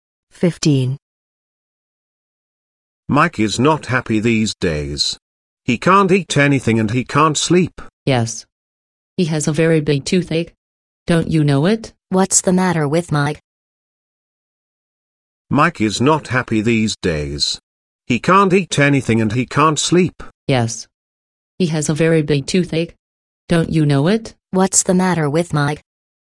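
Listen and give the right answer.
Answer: He has a very big toothache.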